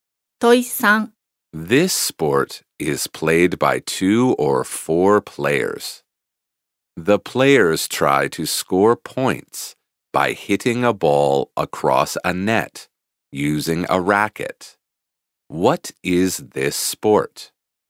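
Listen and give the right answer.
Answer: Tennis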